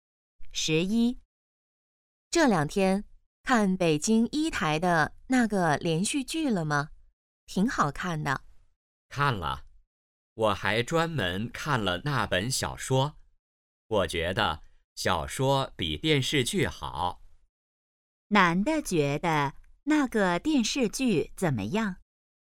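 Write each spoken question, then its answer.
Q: 男的觉得那个电视剧怎么样?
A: 不如小说好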